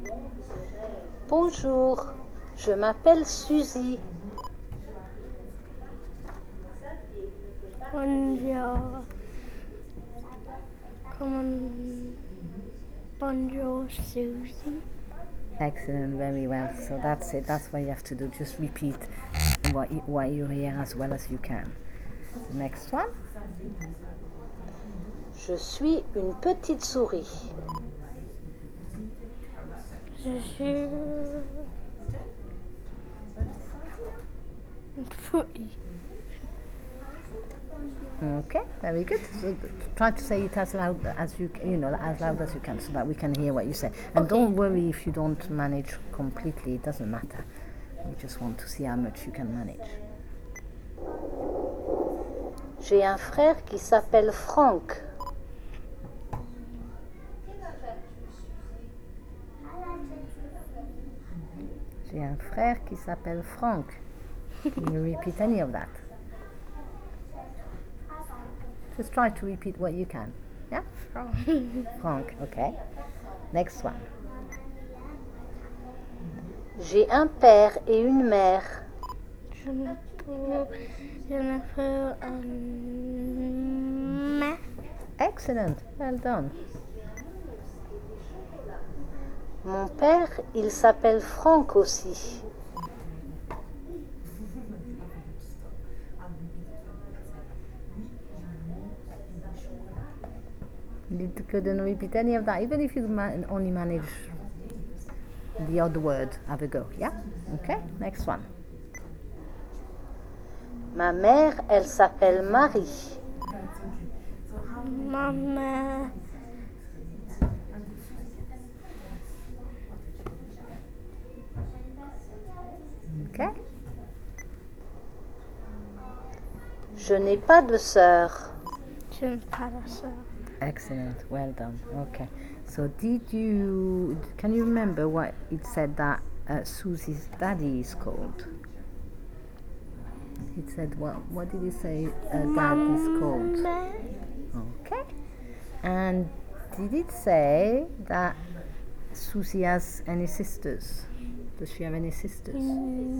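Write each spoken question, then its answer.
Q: what did it say dad is called?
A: Franck

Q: Does she have any sisters?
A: No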